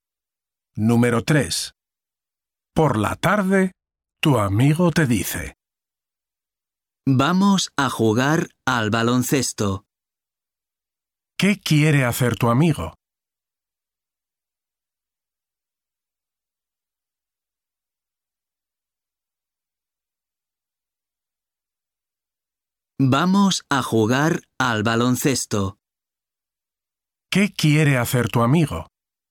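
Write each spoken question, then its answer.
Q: ¿Qué quiere hacer tu amigo?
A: jugar al baloncesto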